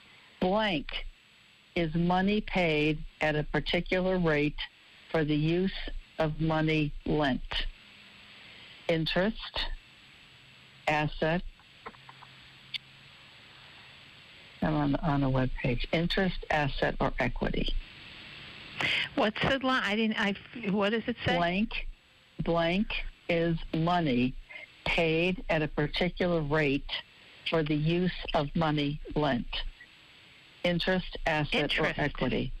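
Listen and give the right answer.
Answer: A: Interest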